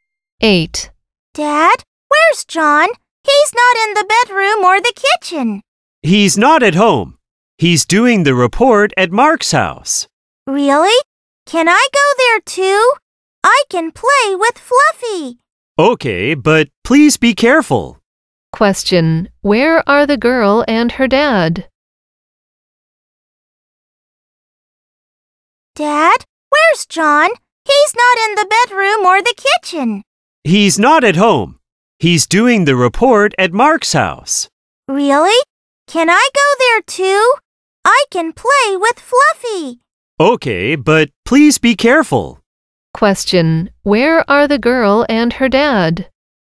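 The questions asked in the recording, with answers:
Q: Where are the girl and her dad?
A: At home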